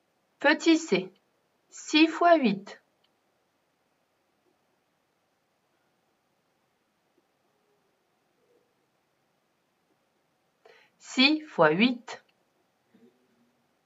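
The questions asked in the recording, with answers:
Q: 6 fois 8.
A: 48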